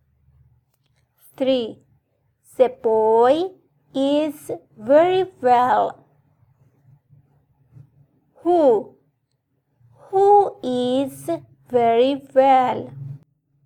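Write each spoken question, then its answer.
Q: Who is very well?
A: the boy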